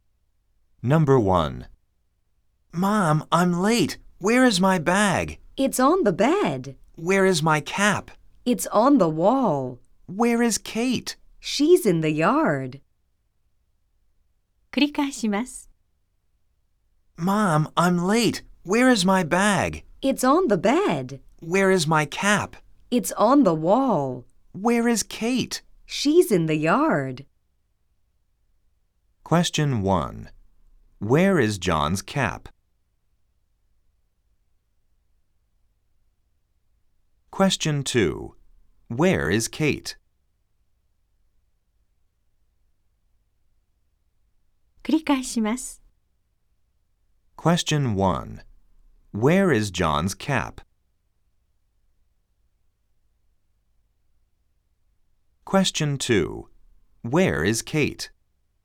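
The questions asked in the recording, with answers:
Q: Where is John's cap?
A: It's on the wall.

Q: Where is Kate?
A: She's in the yard.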